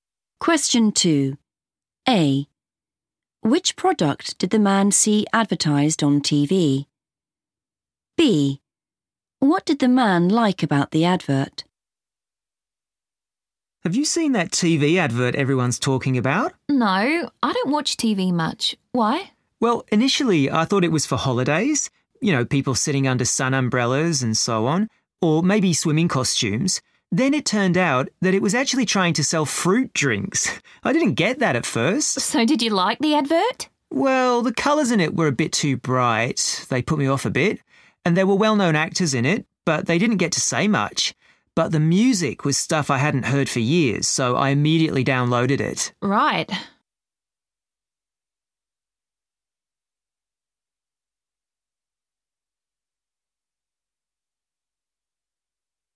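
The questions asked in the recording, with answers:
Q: Which product did the man see advertised on TV?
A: fruit drinks

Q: What did the man like about the advert?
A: the music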